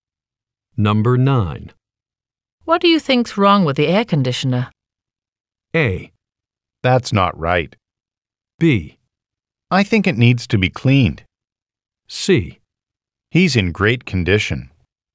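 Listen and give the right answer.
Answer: B: I think it needs to be cleaned.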